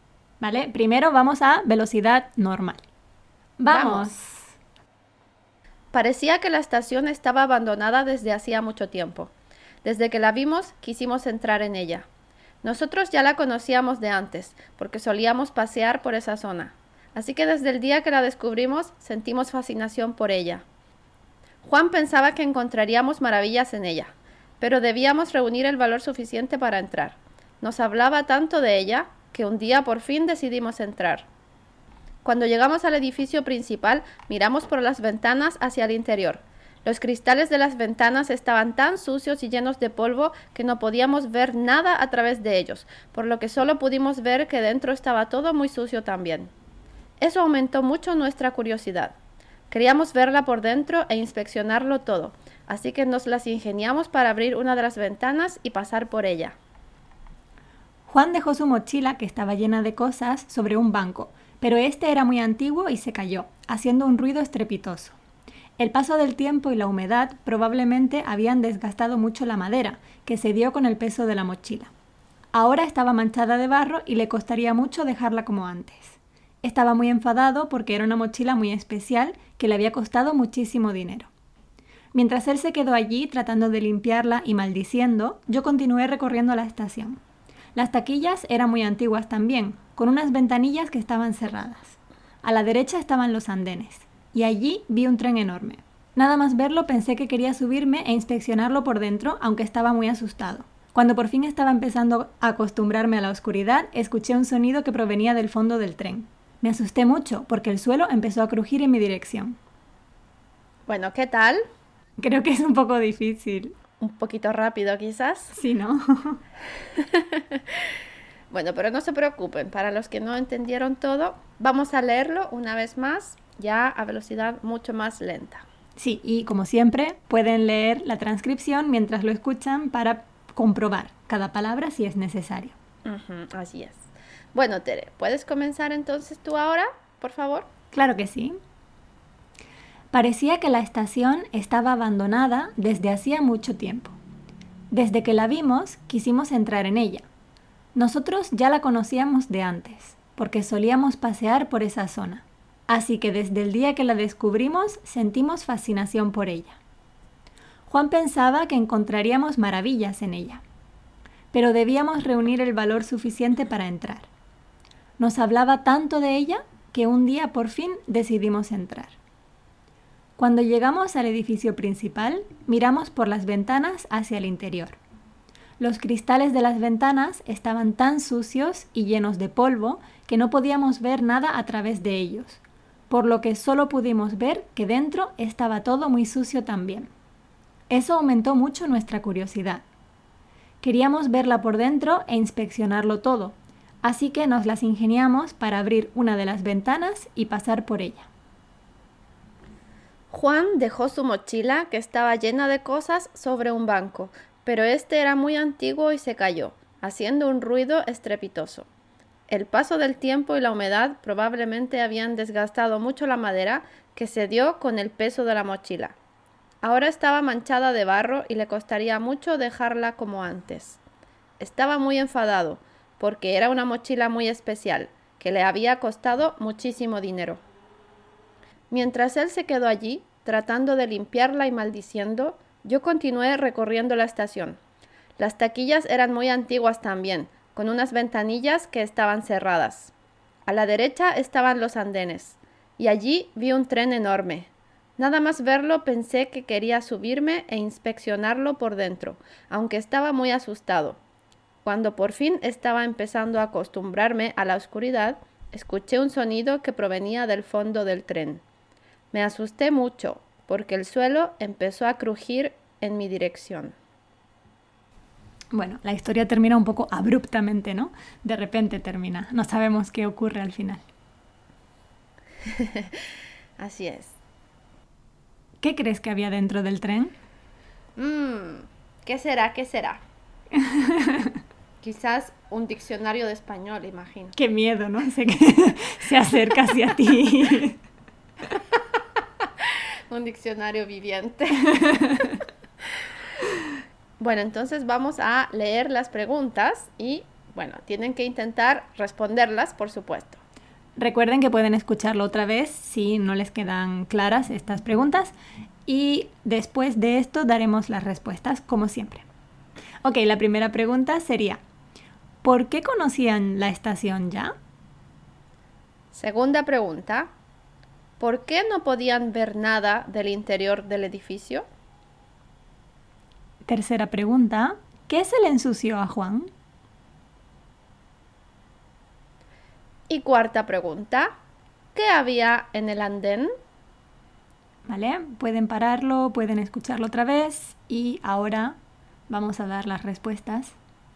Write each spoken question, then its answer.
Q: ¿por qué conocían la estación ya?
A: La respuesta es porque ellos solían pasear por esa zona.

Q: ¿Por qué no podían ver nada del interior del edificio?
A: La respuesta es porque las ventanas estaban sucias.

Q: ¿qué se le ensució a Juan?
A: La respuesta es la mochila.

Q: ¿qué había en el andén?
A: Había un enorme tren abandonado.